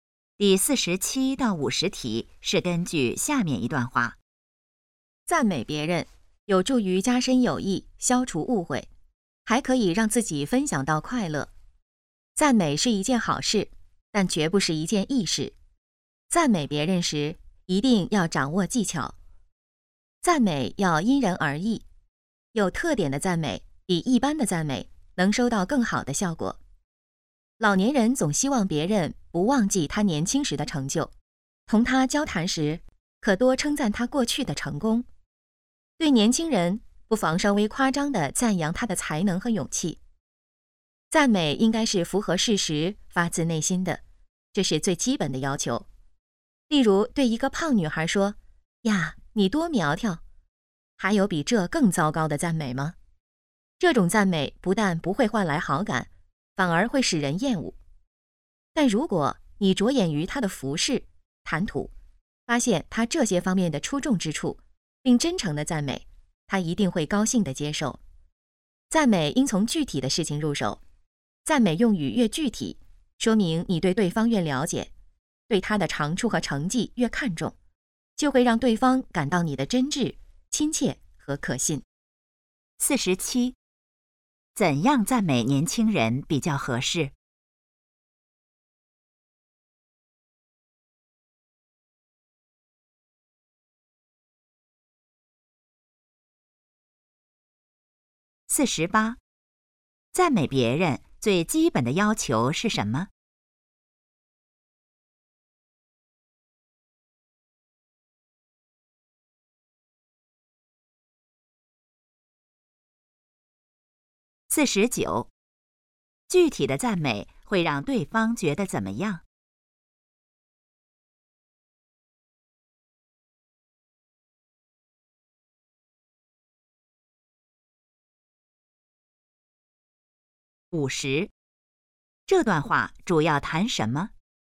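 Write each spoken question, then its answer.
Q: 怎样赞美年轻人比较合适?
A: 稍微夸张地赞扬他的才能和勇气

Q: 赞美别人最基本的要求是什么?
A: 符合事实,发自内心

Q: 具体的赞美会让对方觉得怎么样?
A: 真挚、亲切和可信

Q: 这段话主要谈什么?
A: 赞美别人的技巧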